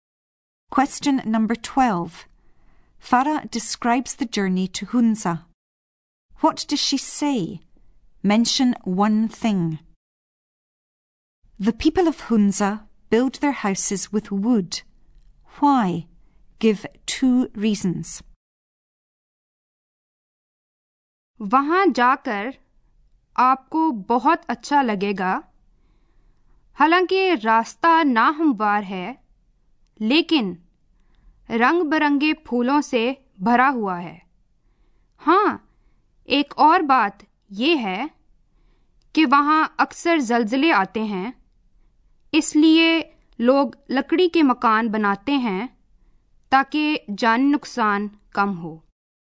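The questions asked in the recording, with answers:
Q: What does she say? Mention one thing.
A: The road is uneven but full of colourful flowers

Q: Why? Give two reasons.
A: There are often earthquakes there; wooden houses mean fewer lives are lost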